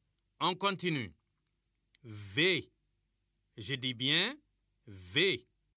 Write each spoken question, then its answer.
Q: On continue. V. Je dis bien V.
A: Monsieur, la lettre qui vient avant V, c'est U.